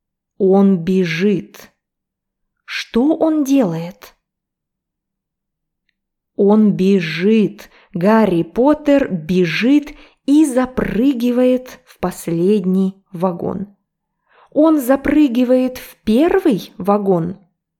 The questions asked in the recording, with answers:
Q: Он запрыгивает в первый вагон?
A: Нет, он запрыгивает в последний вагон.